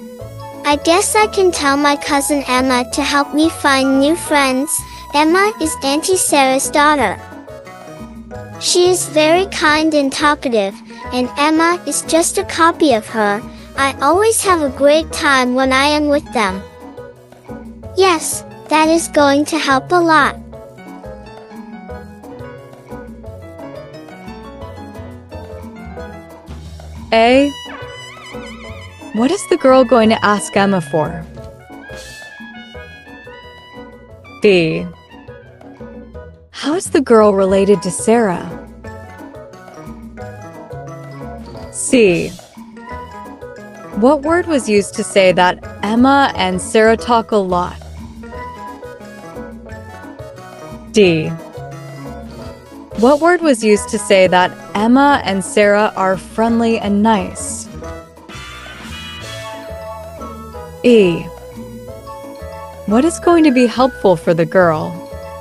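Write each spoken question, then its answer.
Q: What is the girl going to ask Emma for?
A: To help her find new friends

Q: How is the girl related to Sarah?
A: Sarah is her aunt (she is Sarah's niece)

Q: What word was used to say that Emma and Sarah talk a lot?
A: Talkative

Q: What word was used to say that Emma and Sarah are friendly and nice?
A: Kind

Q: What is going to be helpful for the girl?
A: Emma helping her find new friends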